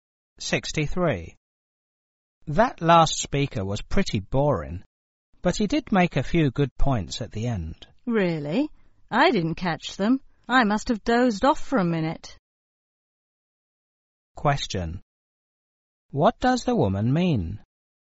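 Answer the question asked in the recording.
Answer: She fell asleep and missed the good points.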